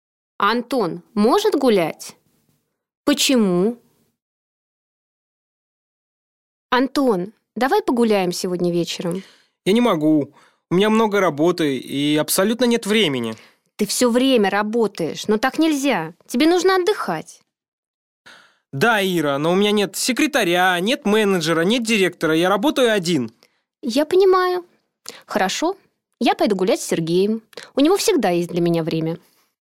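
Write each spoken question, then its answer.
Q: Антон может гулять? Почему?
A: Нет, у него много работы и нет времени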